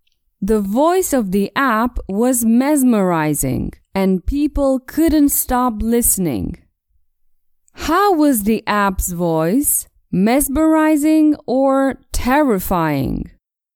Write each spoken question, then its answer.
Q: How was the app's voice? Mesmerizing or terrifying?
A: The app's voice was mesmerizing.